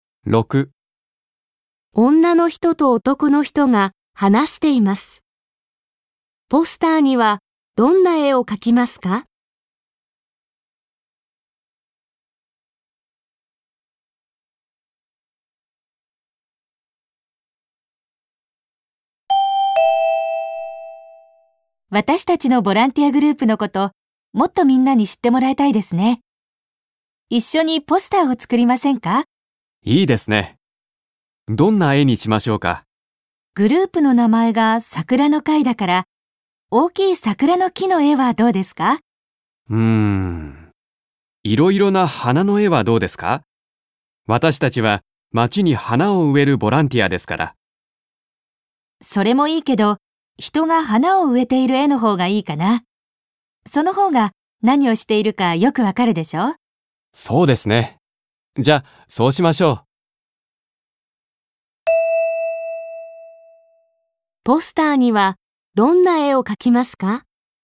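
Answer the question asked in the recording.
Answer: 人が花を植えている絵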